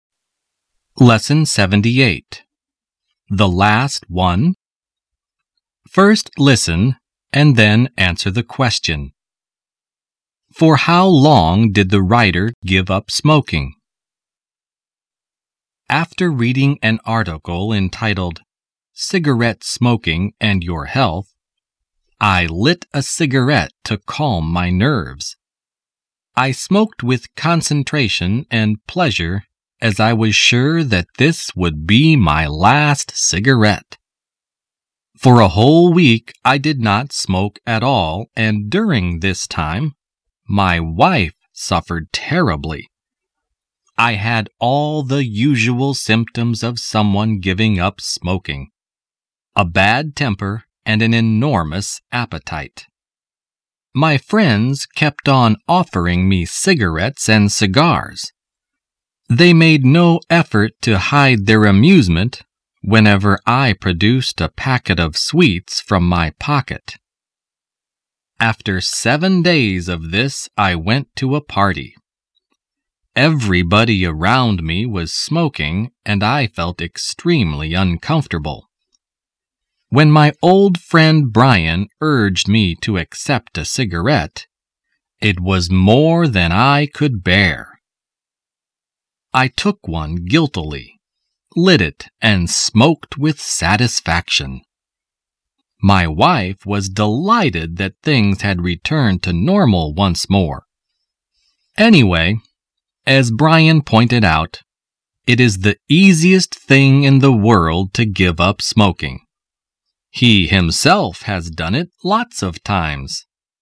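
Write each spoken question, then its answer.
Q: For how long did the writer give up smoking?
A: For a whole week (7 days)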